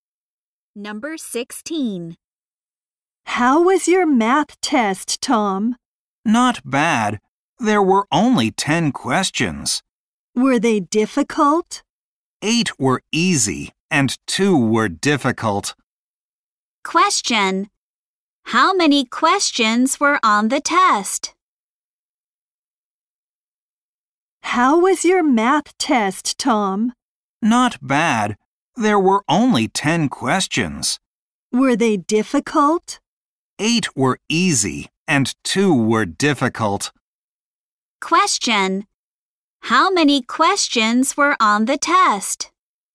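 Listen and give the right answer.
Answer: 10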